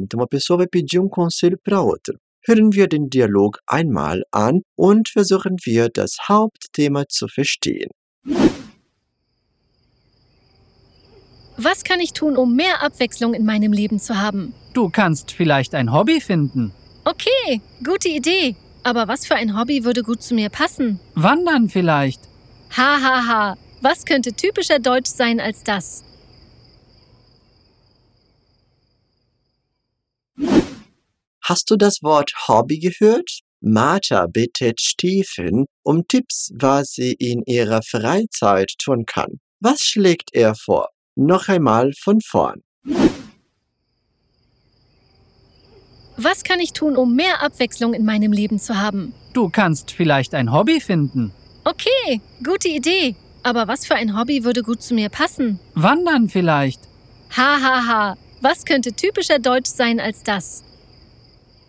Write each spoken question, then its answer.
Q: Was schlägt er vor?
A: Und Stephens Vorschlag ist, du kannst vielleicht ein Hobby finden.